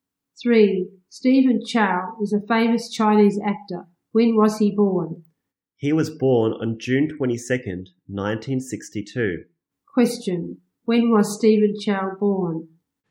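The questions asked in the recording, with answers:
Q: When was Stephen Chow born?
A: On June 22, 1962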